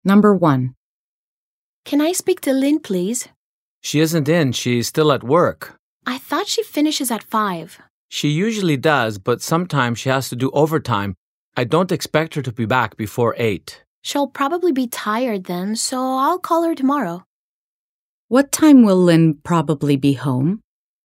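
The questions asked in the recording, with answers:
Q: What time will Lynn probably be home?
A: At about 8 o'clock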